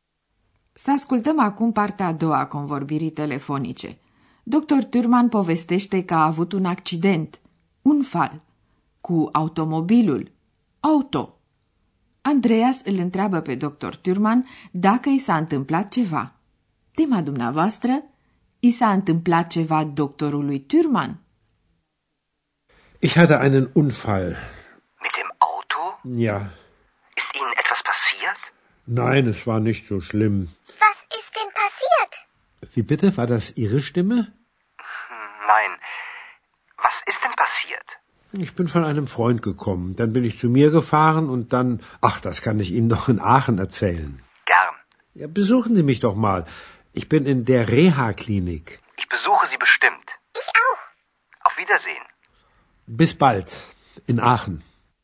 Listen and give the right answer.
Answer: Tot ce a putut afla deocamdată Andreas este că doctorului Thürmann nu i s-a întâmplat nimic grav.